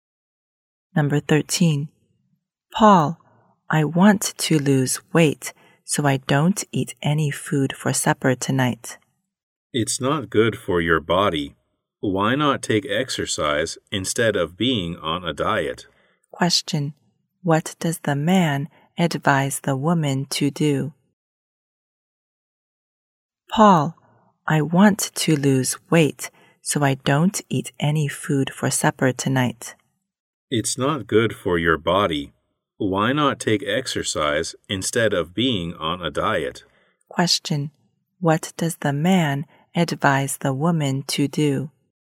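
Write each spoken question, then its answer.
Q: What does the man advise the woman to do?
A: Take exercise instead of being on a diet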